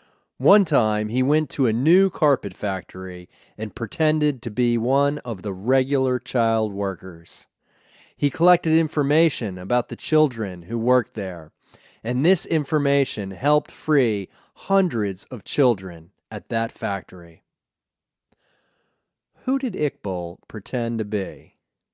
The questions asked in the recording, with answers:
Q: Who did Iqbal pretend to be?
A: Iqbal pretended to be one of the regular child workers.